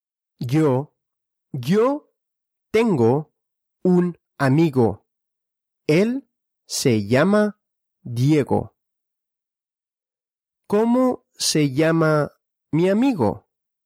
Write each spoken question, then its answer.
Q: ¿Cómo se llama mi amigo?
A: Diego. Él se llama Diego.